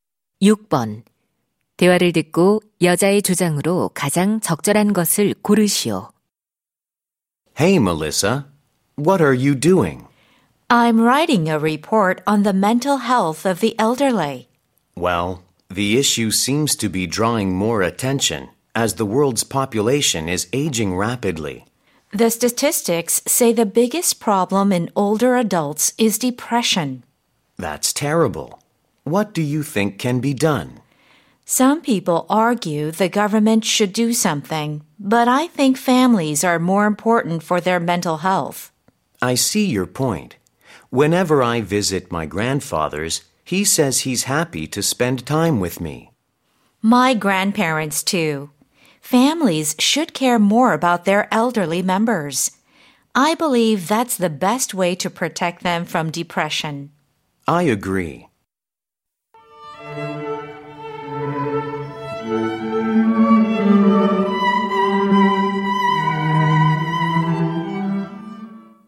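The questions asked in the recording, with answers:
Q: 대화를 듣고 여자의 주장으로 가장 적절한 것을 고르시오.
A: 노인의 정신 건강을 위해 가족이 더 관심을 가져야 한다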